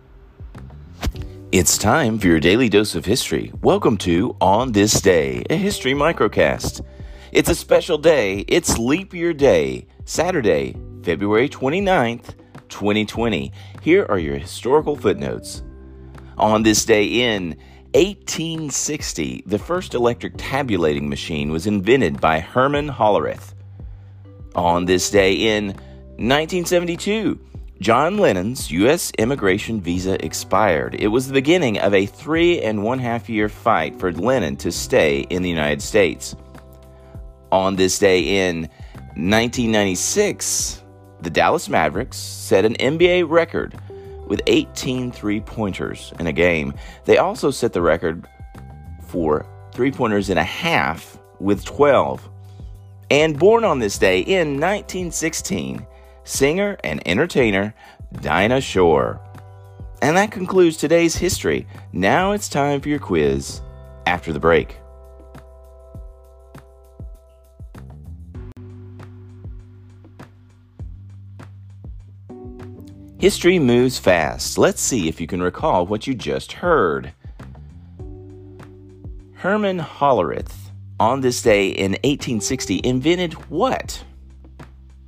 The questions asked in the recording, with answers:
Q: Herman Hollerith, on this day in 1860, invented what?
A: Herman Hollerith was the inventor of the first electric tabulating machine.